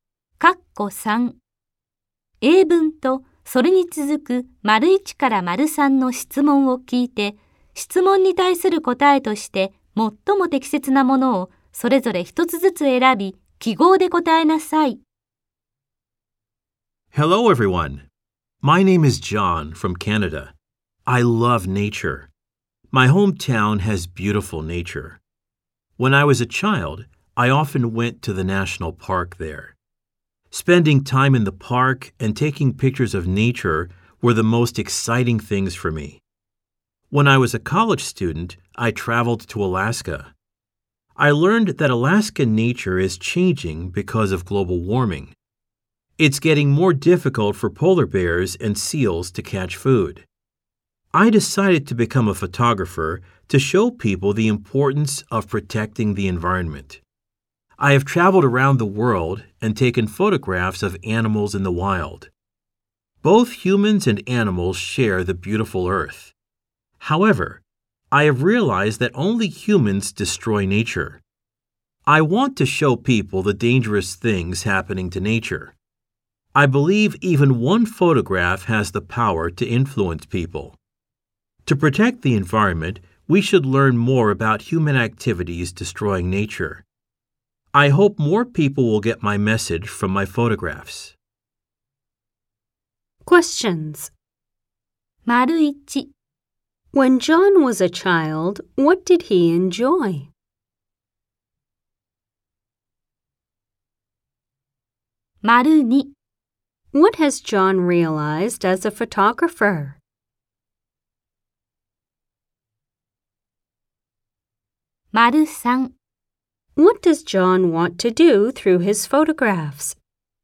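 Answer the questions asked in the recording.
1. Spending time in the national park and taking pictures of nature
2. Only humans destroy nature
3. Show people the dangerous things happening to nature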